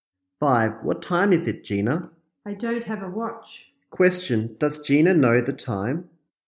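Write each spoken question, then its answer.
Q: Does Gina know the time?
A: No, she doesn't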